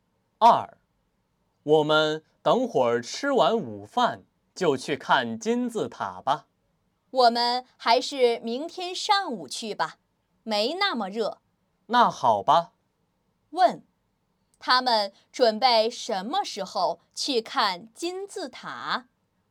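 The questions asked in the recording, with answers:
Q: 他们准备什么时候去看金字塔?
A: 明天上午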